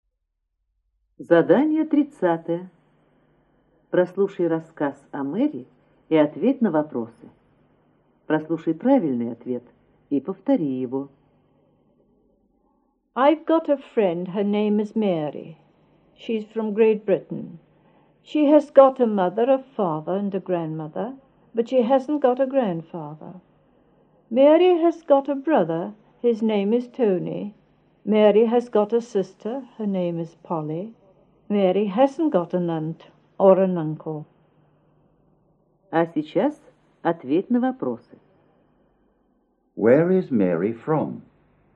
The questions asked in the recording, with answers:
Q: Where is Mary from?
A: She is from Great Britain.